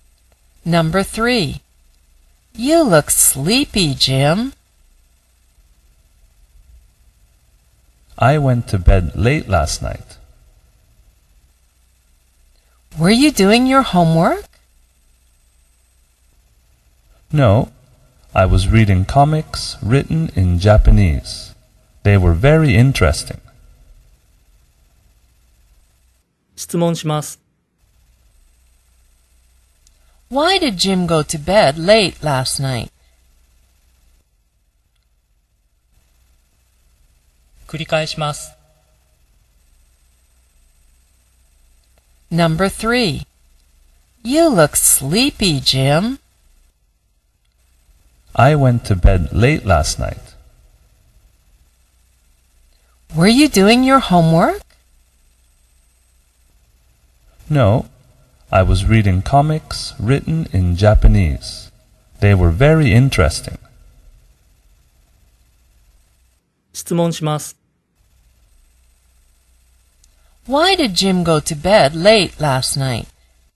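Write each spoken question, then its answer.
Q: Why did Jim go to bed late last night?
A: He was reading comics written in Japanese.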